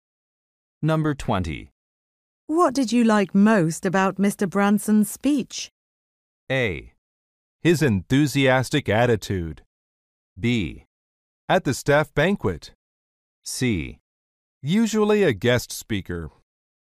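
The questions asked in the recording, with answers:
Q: What did you like most about Mr. Branson's speech?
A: A: His enthusiastic attitude.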